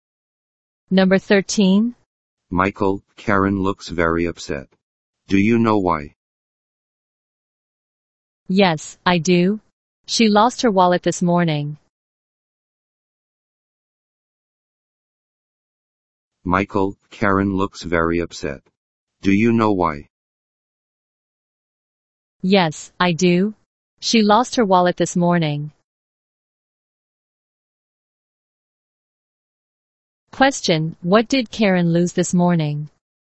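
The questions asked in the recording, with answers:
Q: Question, what did Karen lose this morning?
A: Her wallet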